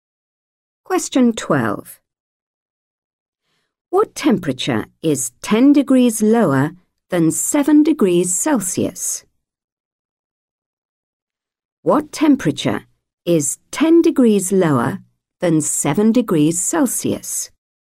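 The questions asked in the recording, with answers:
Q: What temperature is 10 degrees lower than 7 degrees Celsius?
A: -3 degrees Celsius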